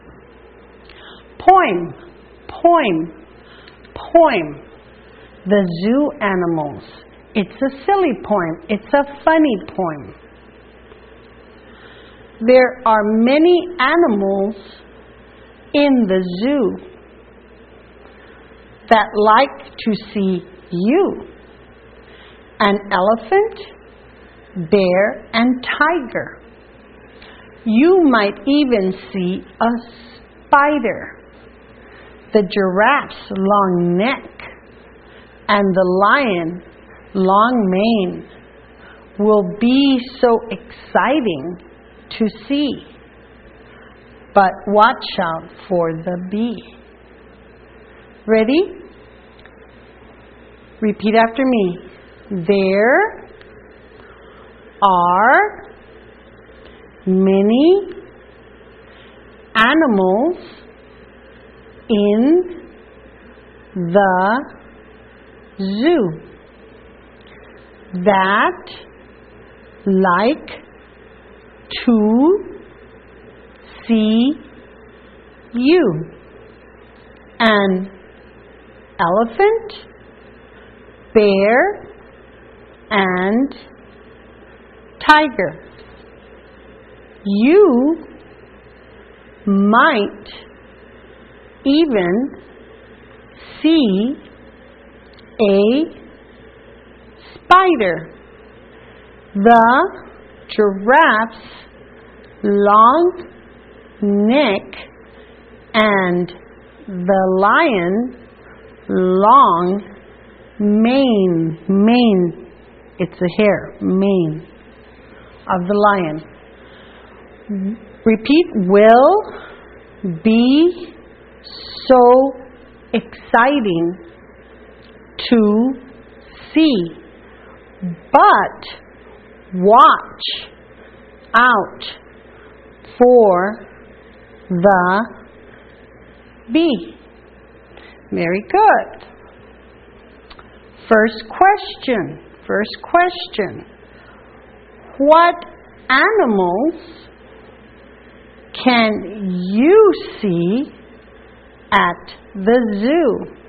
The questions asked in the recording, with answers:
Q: First question. What animals can you see at the zoo?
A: An elephant, a bear, a tiger, a giraffe, a lion.